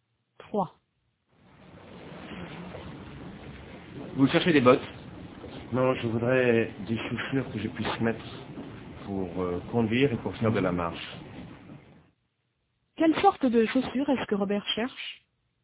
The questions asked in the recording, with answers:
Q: Quelle sorte de chaussures est-ce que Robert cherche ?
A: Des chaussures qu'il puisse mettre pour conduire et pour faire de la marche.